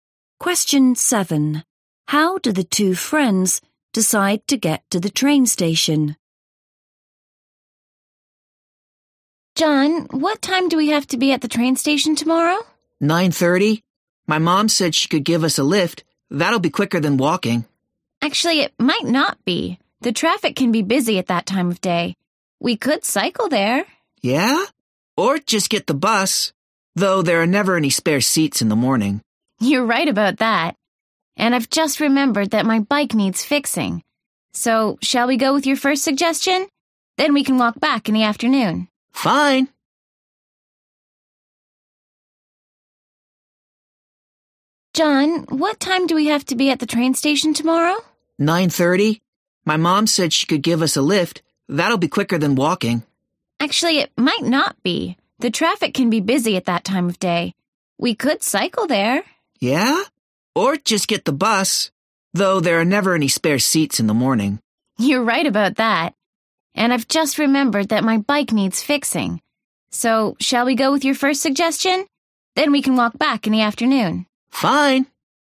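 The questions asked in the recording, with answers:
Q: How do the two friends decide to get to the train station?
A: By car (John's mum gives them a lift)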